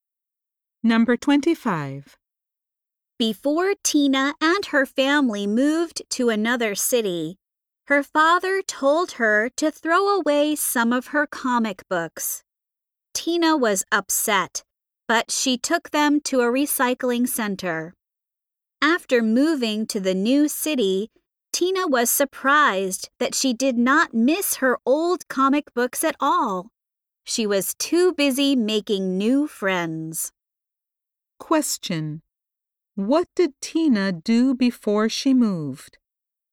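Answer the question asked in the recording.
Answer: She took some of her comic books to a recycling center.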